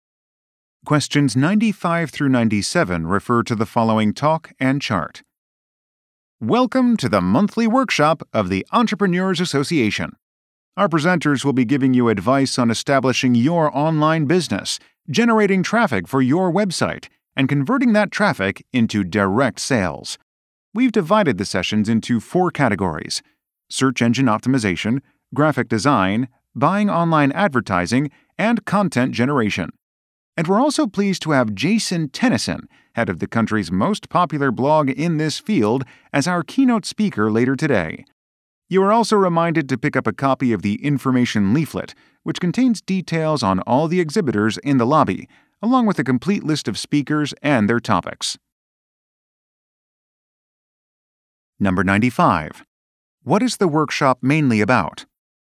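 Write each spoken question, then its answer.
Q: What is the workshop mainly about?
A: Establishing and growing an online business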